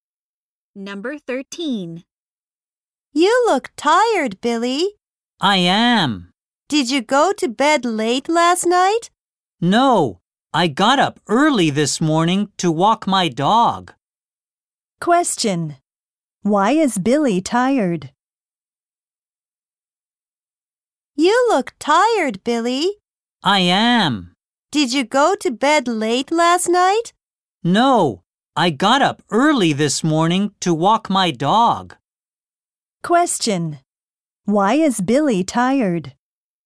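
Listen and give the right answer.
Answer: He got up early to walk his dog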